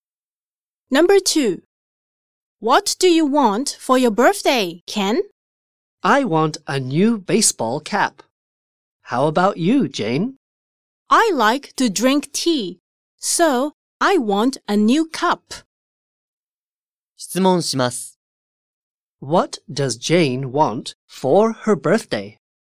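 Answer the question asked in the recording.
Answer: A new cup.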